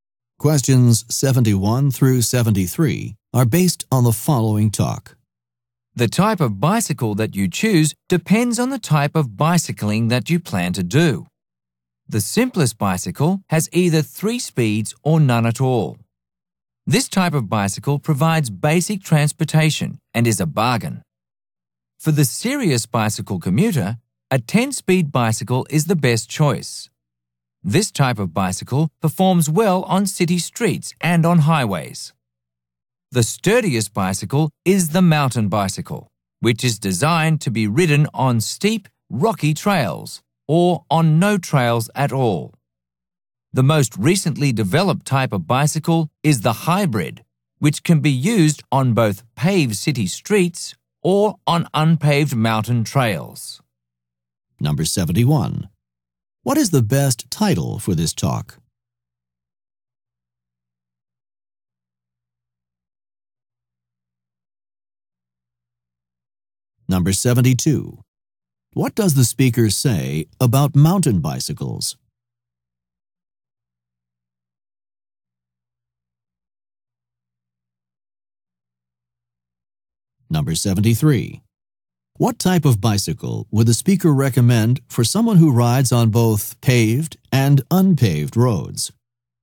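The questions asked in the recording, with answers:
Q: What is the best title for this talk?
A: Types of bicycles / choosing a bicycle

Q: What does the speaker say about mountain bicycles?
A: They are the sturdiest, made for steep rocky trails

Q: What type of bicycle would the speaker recommend for someone who rides on both paved and unpaved roads?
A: A hybrid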